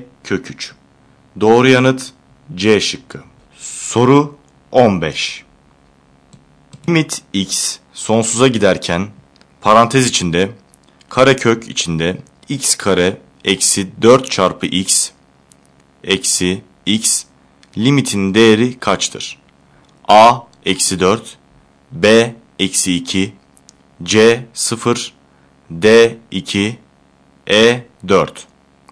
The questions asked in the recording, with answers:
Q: Limit x sonsuza giderken parantez içinde karekök içinde x kare eksi 4 çarpı x eksi x limitin değeri kaçtır?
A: Doğru yanıt B şıkkı.